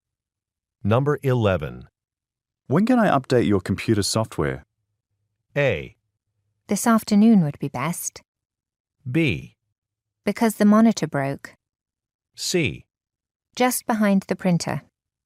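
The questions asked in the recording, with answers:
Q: When can I update your computer software?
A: A: This afternoon would be best.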